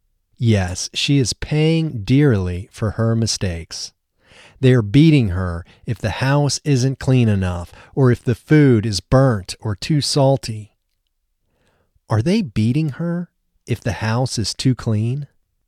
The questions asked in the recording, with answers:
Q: Are they beating her if the house is too clean?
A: No, they aren't beating her if the house is too clean.